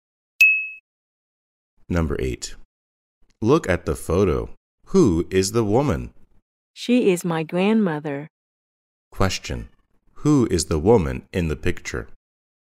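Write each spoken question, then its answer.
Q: Who is the woman in the picture?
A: The speaker's grandmother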